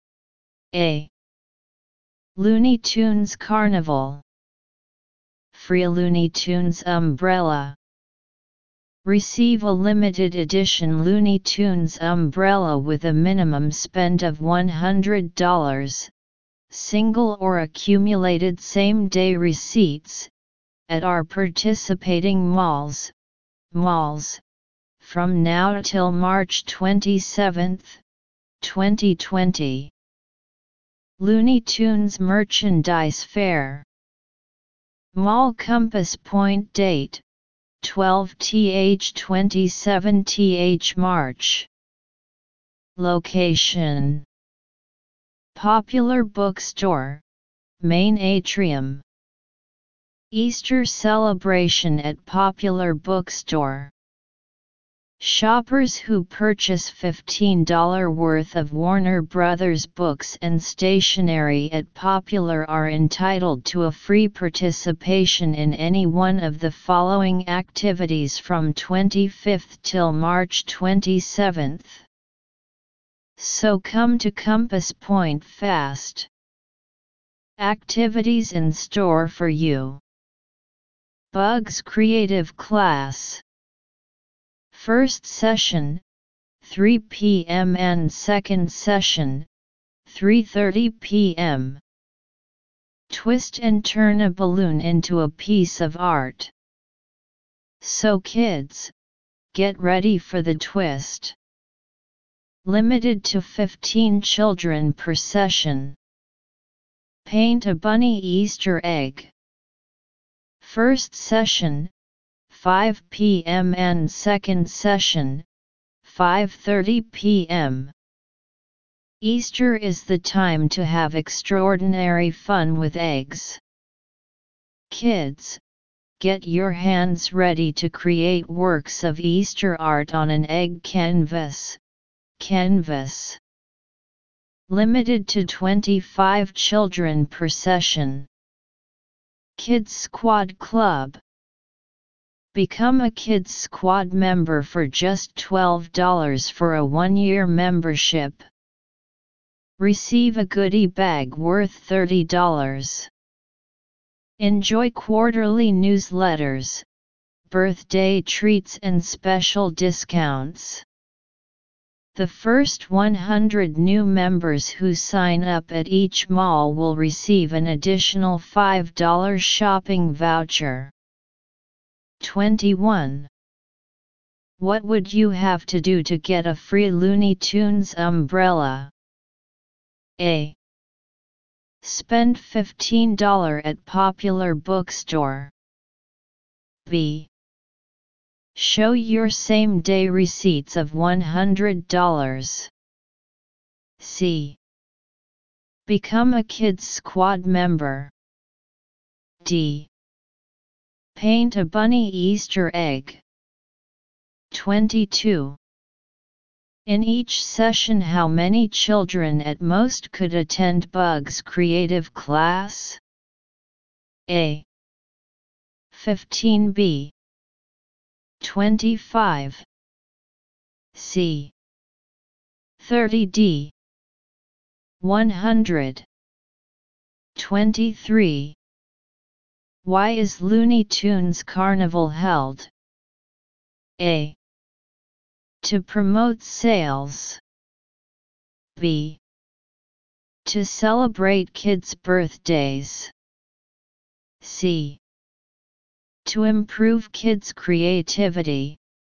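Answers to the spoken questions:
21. B: Show your same-day receipts of $100.
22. A: 15
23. A: To promote sales.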